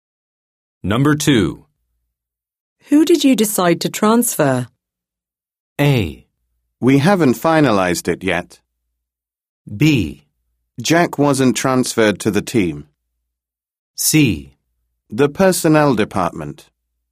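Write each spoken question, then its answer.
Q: Who did you decide to transfer?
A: A: We haven't finalized it yet.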